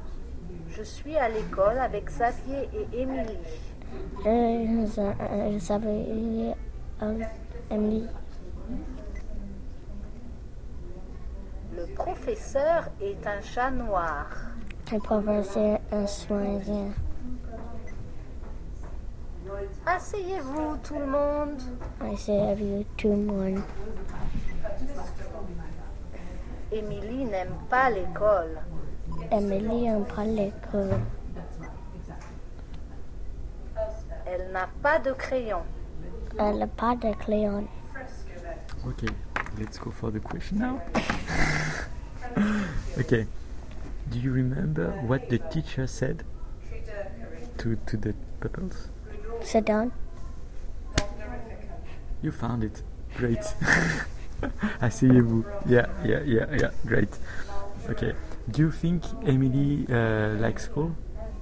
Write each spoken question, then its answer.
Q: Do you think Emily likes school?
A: In fact, it was said, Emily n'aime pas l'école. That means she doesn't like school.